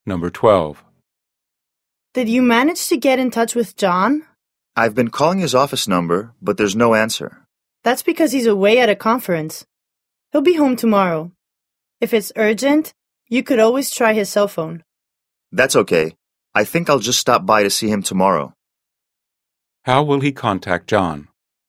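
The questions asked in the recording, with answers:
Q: How will he contact John?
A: He will stop by to see him in person tomorrow.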